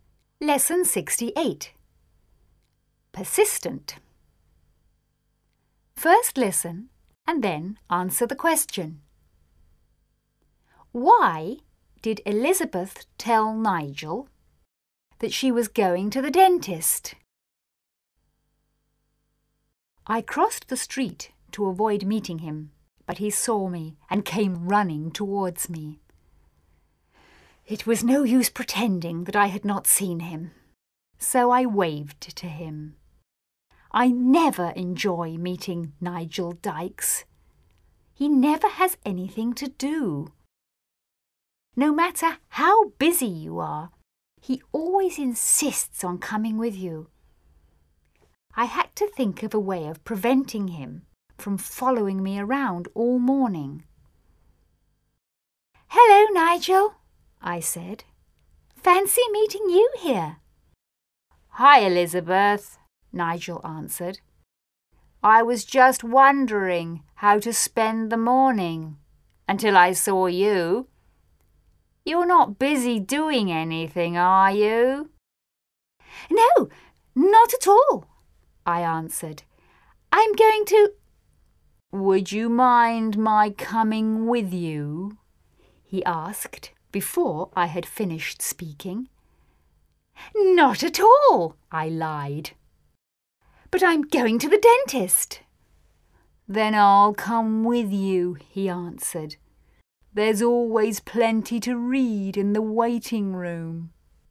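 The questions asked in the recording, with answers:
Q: Why did Elizabeth tell Nigel that she was going to the dentist?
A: To stop him from following her around all morning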